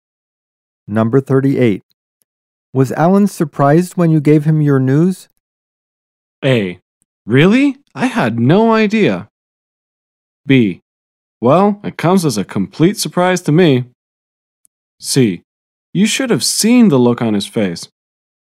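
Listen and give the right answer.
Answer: C: You should have seen the look on his face.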